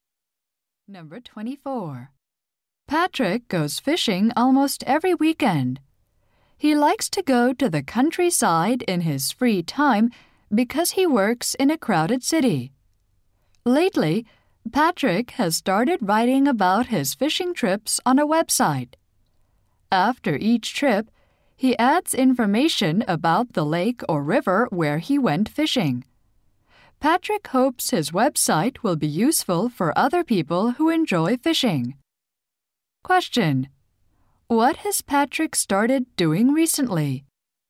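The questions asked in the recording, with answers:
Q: What has Patrick started doing recently?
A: Writing about his fishing trips on a website.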